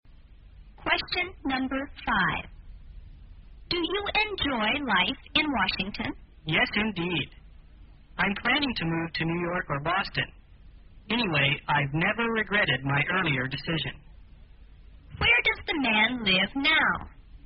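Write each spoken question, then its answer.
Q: Where does the man live now?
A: In Washington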